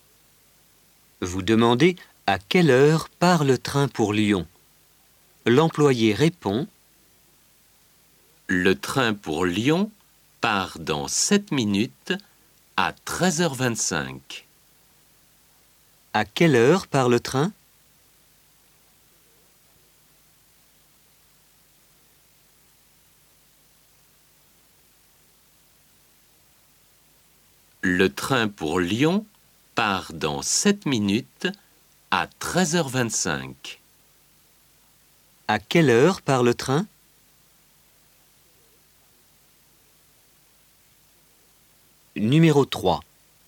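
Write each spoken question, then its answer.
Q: À quelle heure part le train?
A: À 13h25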